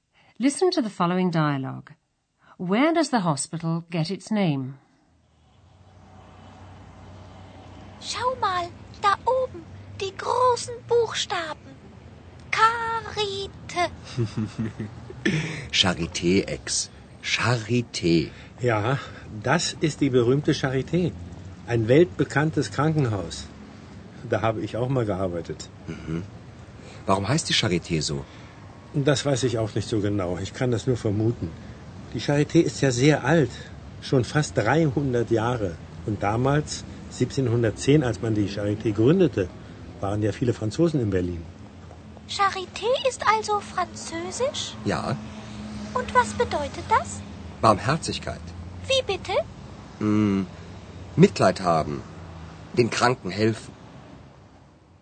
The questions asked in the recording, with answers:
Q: Where does the hospital get its name?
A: Charité is a French word which means charity or compassion.